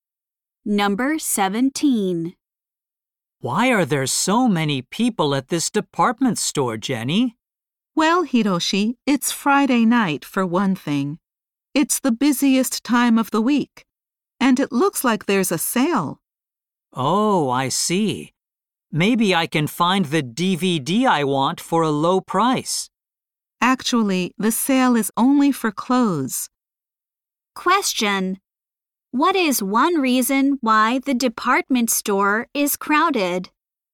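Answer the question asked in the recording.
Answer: It is Friday night, the busiest time of the week (and there is a sale).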